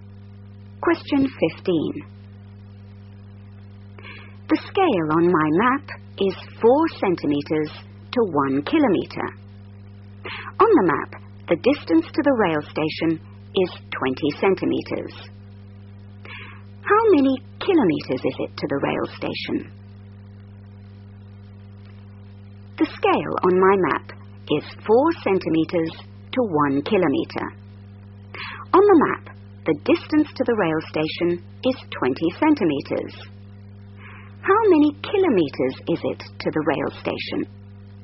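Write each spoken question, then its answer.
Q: How many kilometers is it to the rail station?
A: 5 km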